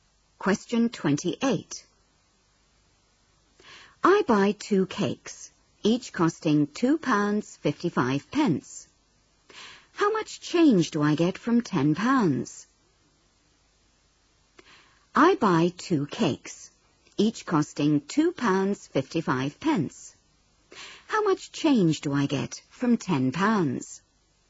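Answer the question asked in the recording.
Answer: £4.90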